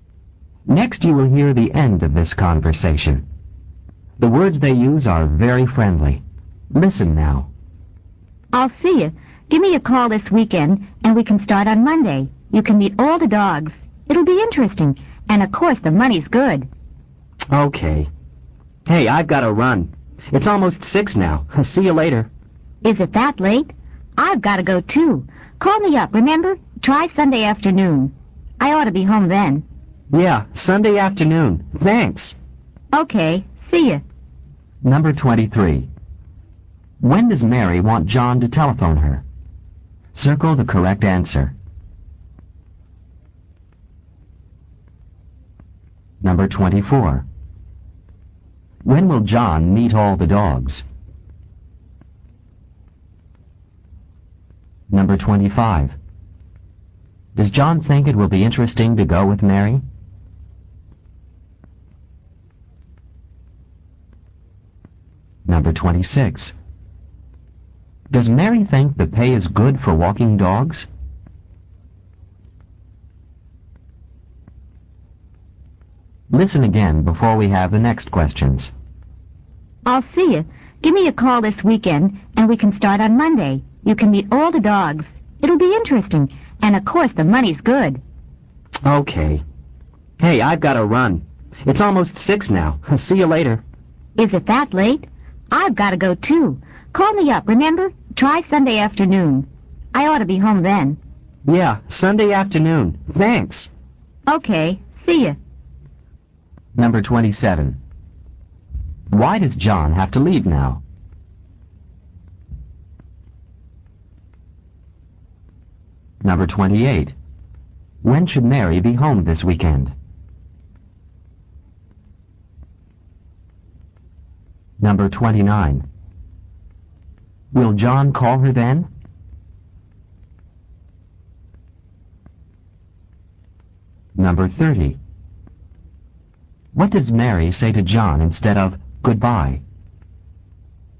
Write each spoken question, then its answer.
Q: When does Mary want John to telephone her?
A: The correct answer for number 23 is B, this weekend.

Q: When will John meet all the dogs?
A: Number 24, A, on Monday.

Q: Does Mary think the pay is good for walking dogs?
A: Number 26, A, yes she does.

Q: Why does John have to leave now?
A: Number 27, it's almost 6.

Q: When should Mary be home this weekend?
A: Number 28, she ought to be home Sunday afternoon.

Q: Will John call her then?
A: Number 29, the correct answer is A, yes I think he will.

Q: What does Mary say to John instead of goodbye?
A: Number 30, see you, or see you.